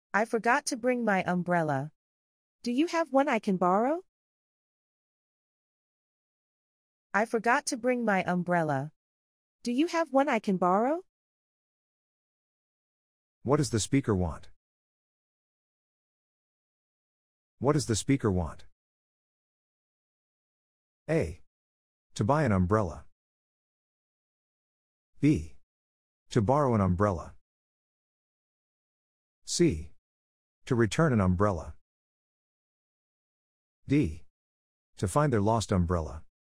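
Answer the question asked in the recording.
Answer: B: To borrow an umbrella.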